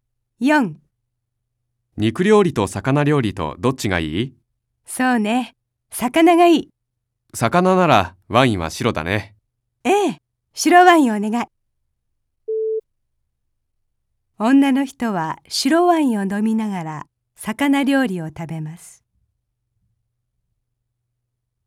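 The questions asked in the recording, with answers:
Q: 女の人は白ワインを飲みながら魚料理を食べます。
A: ○(正しい)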